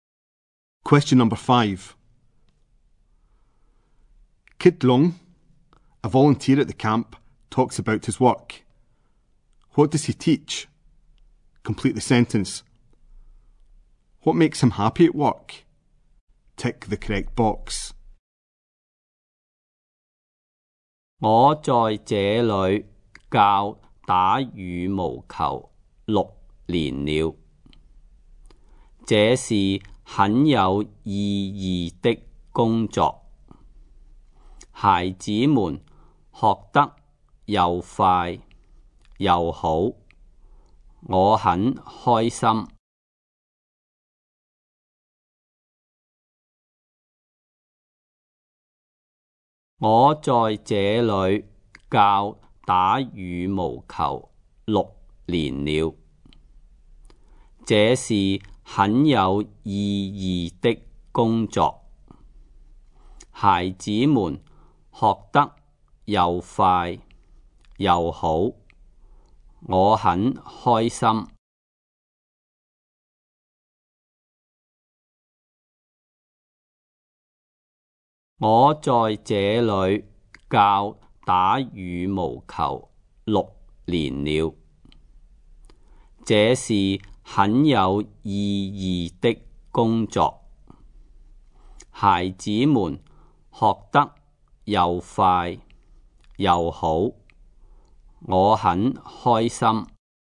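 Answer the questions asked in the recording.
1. Badminton
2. The children learn quickly and well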